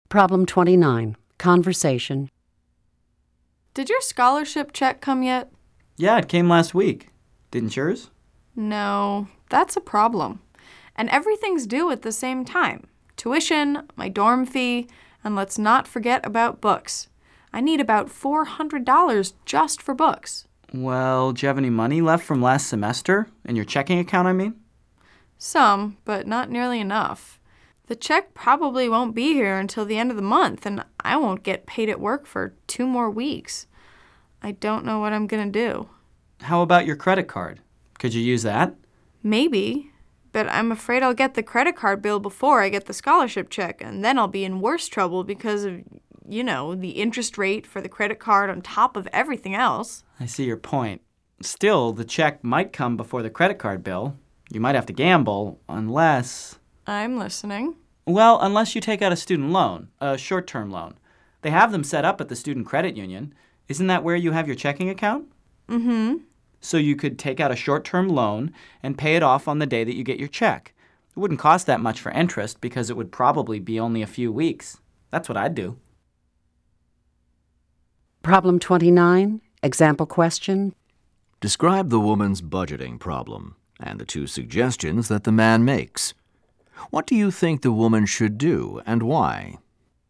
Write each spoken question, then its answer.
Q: Describe the woman's budgeting problem and the two suggestions that the man makes.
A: The woman doesn't have enough money for her expenses.